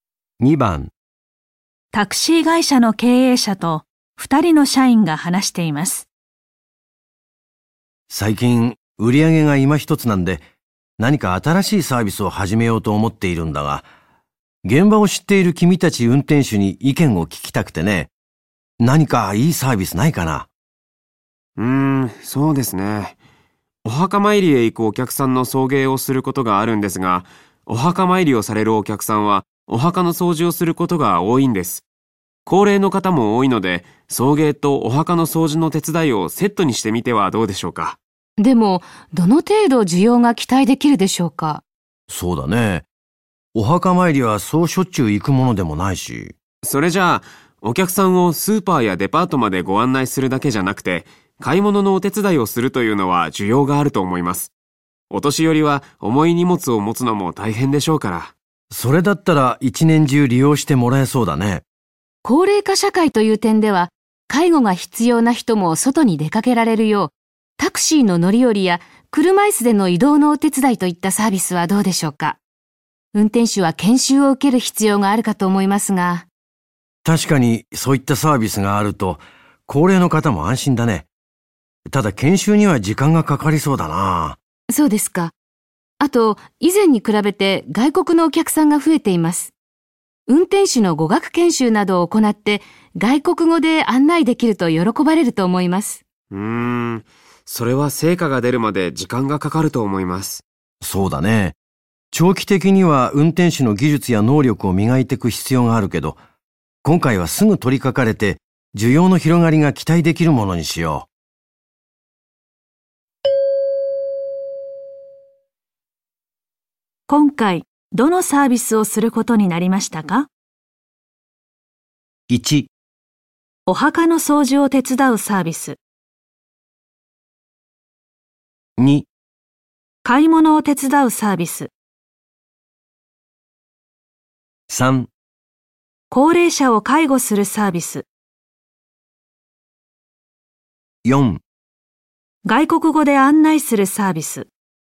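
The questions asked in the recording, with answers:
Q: 今回どのサービスをすることになりましたか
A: 2: 買い物を手伝うサービス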